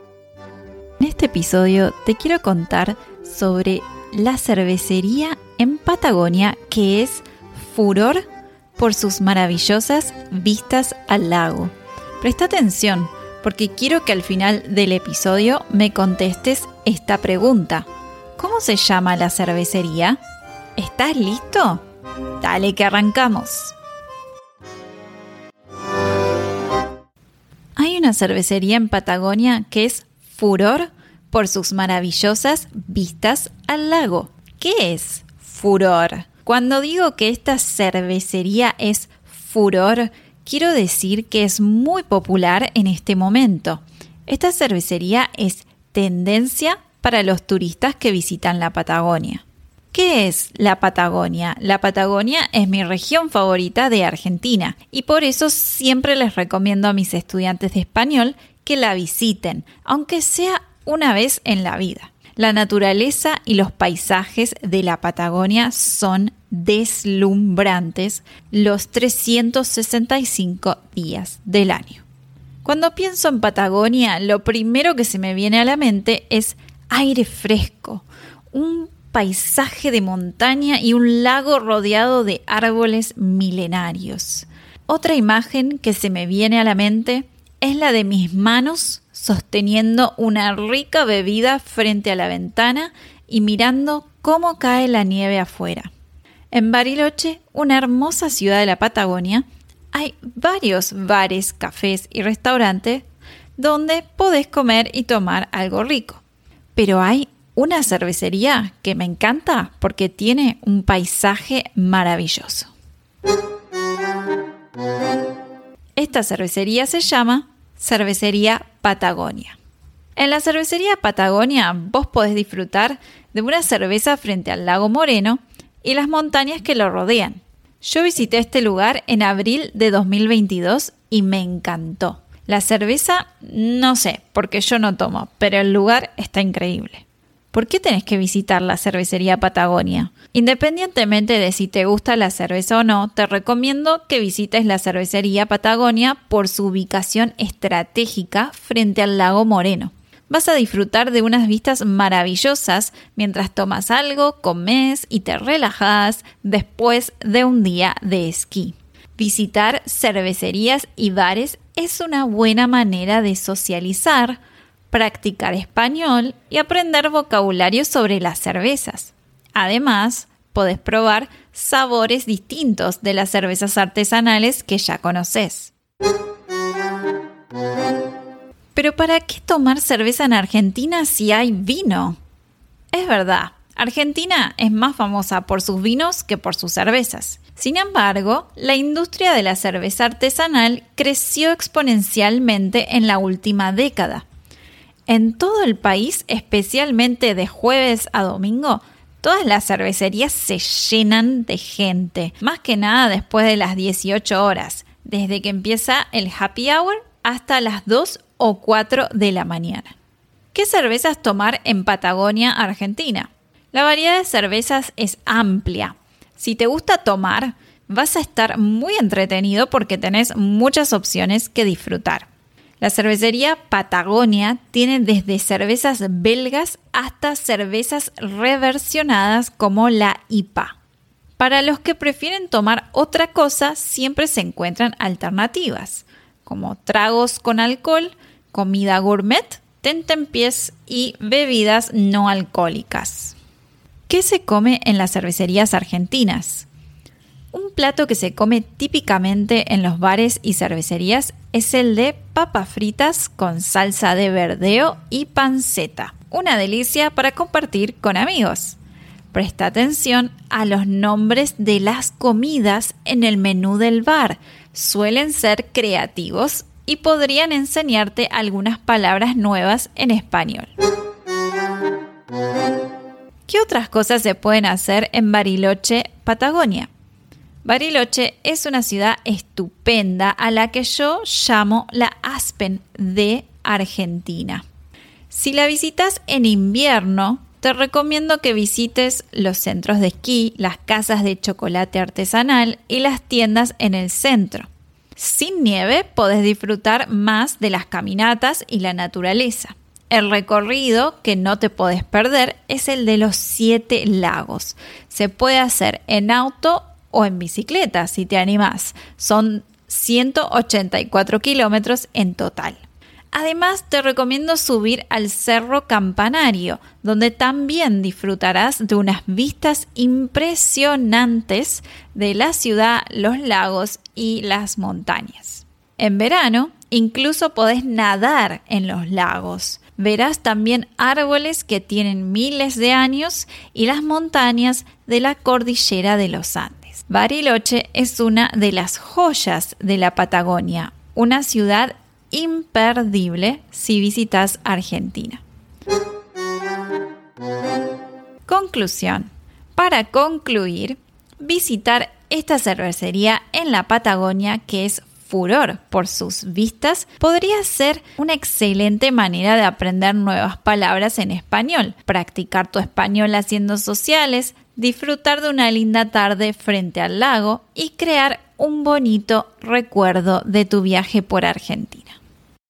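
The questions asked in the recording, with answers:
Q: ¿Cómo se llama la cervecería?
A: Cervecería Patagonia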